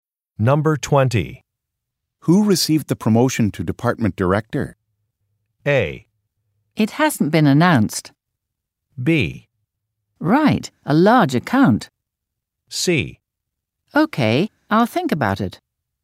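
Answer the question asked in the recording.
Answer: A: It hasn't been announced.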